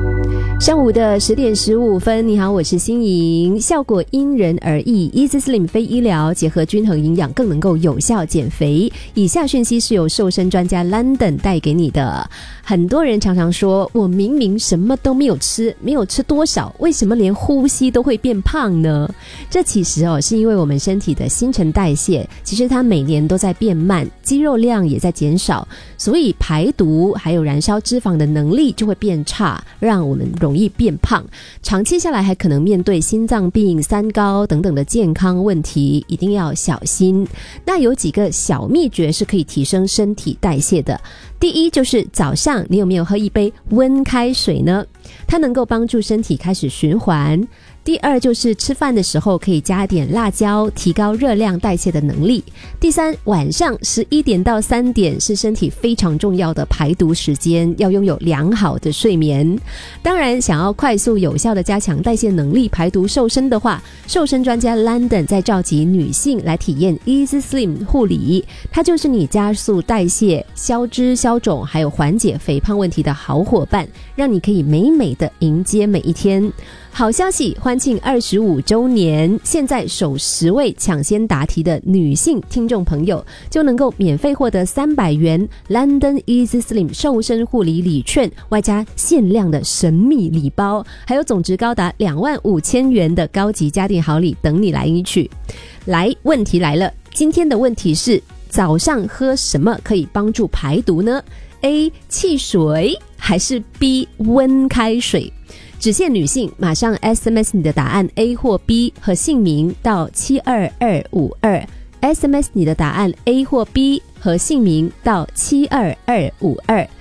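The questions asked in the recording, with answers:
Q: 早上喝什么可以帮助排毒呢?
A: B: 温开水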